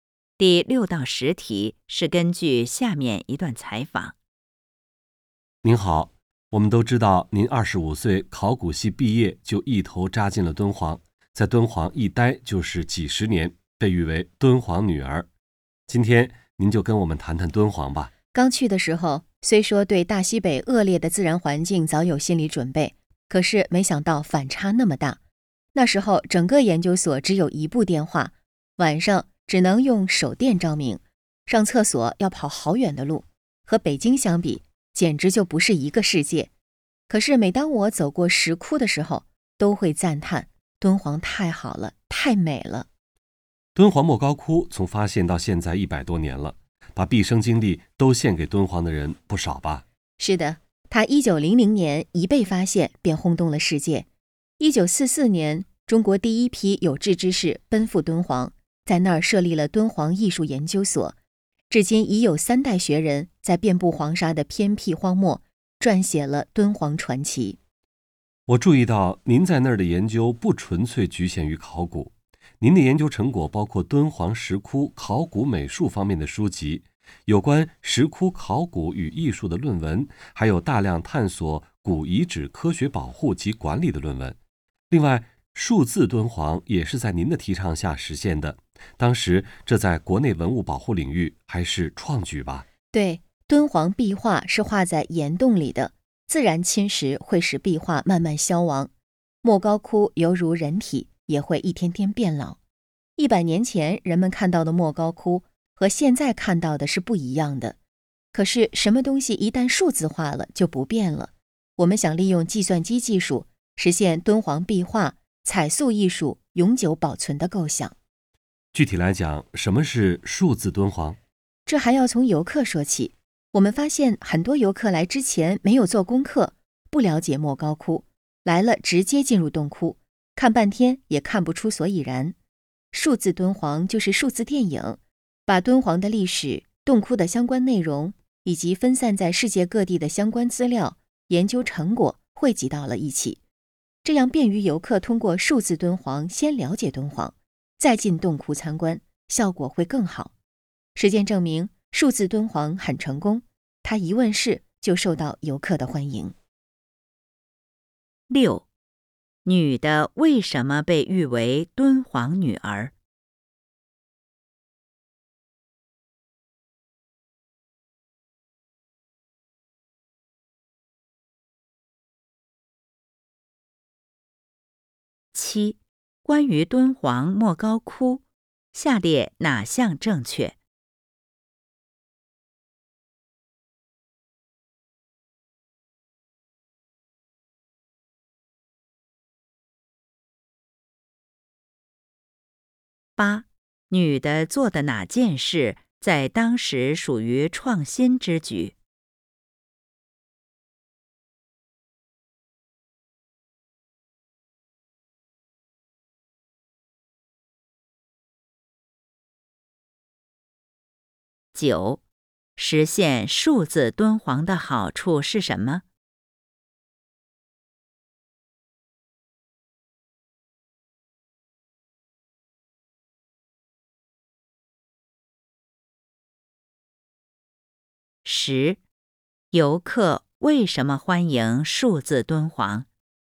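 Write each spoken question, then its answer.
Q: 女的为什么被誉为敦煌女儿?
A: 她毕业后在敦煌一待就是几十年

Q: 女的做的哪件事在当时属于创新之举?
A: 提倡实现数字敦煌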